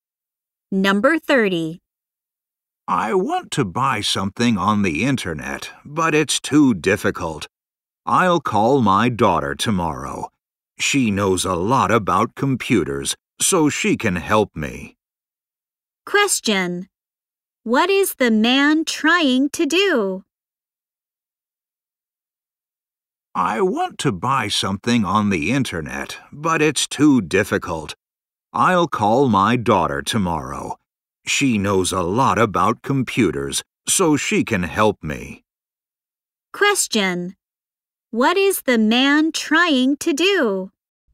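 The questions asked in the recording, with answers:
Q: What is the man trying to do?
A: Buy something on the internet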